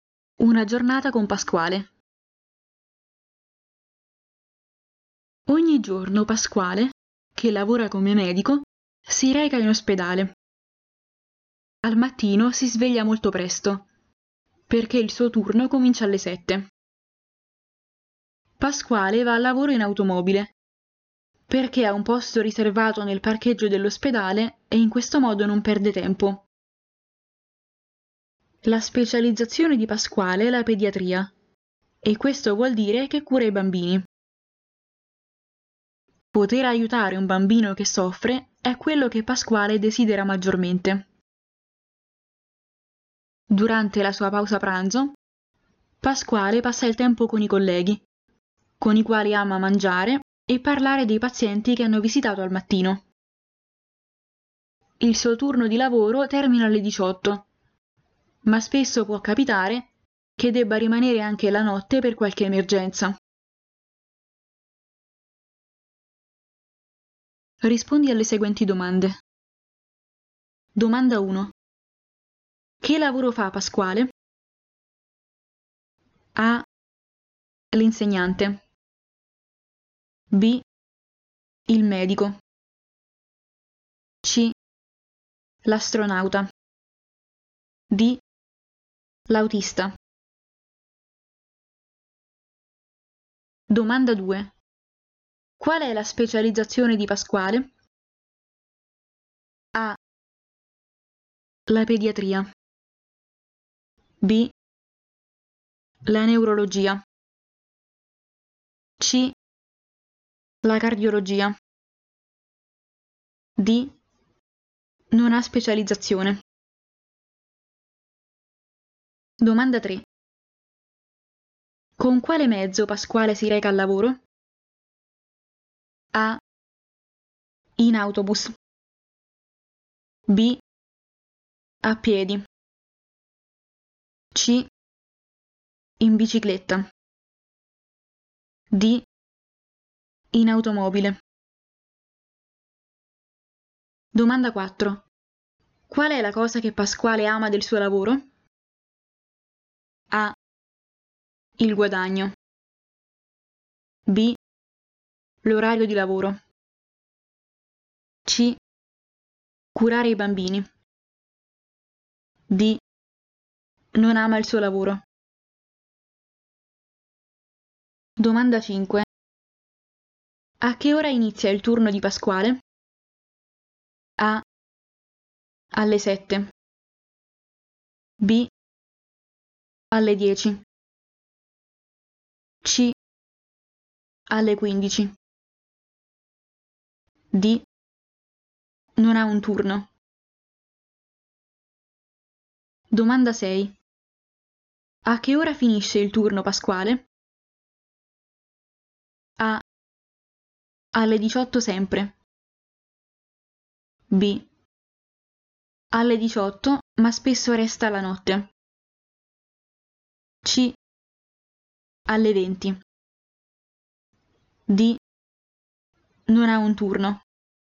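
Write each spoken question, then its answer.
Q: Che lavoro fa Pasquale?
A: B: Il medico.

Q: Qual è la specializzazione di Pasquale?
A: A: La pediatria.

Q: Con quale mezzo Pasquale si reca al lavoro?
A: D: In automobile.

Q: Qual è la cosa che Pasquale ama del suo lavoro?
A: C: Curare i bambini.

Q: A che ora inizia il turno di Pasquale?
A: A: Alle 7.

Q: A che ora finisce il turno Pasquale?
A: B: Alle 18, ma spesso resta la notte.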